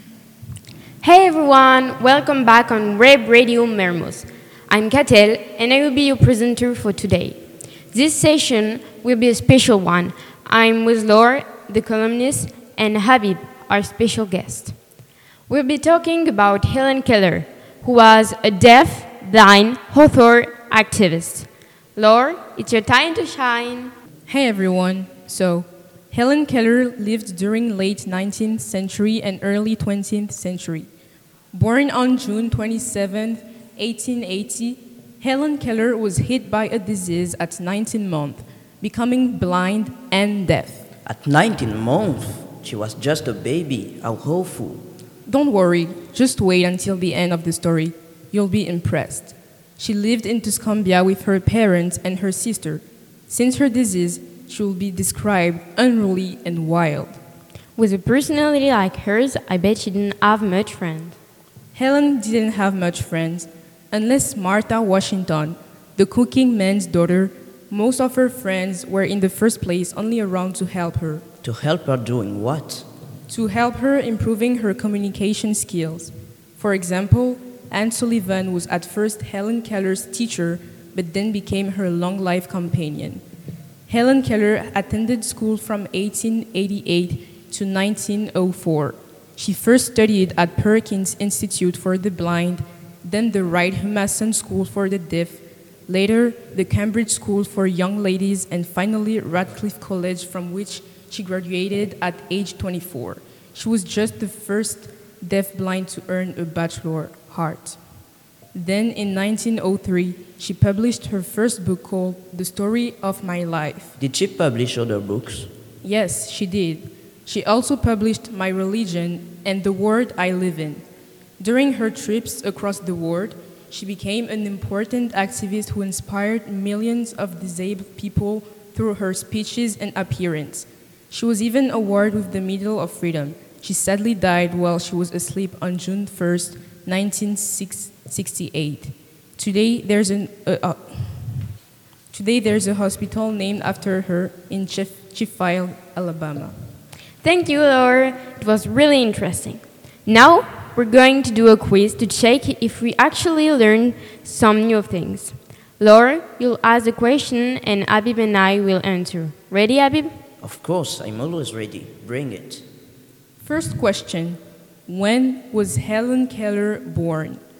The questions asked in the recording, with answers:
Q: First question. When was Helen Keller born?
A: Helen Keller was born on June 27, 1880.